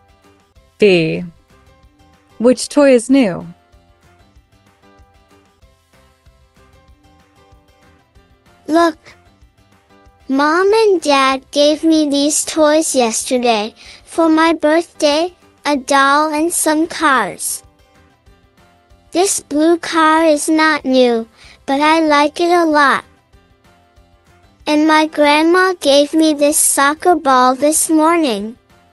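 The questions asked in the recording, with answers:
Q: Which toy is new?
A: The soccer ball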